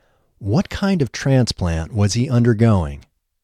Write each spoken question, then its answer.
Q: What kind of transplant was he undergoing?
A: He was undergoing a life-saving heart transplant.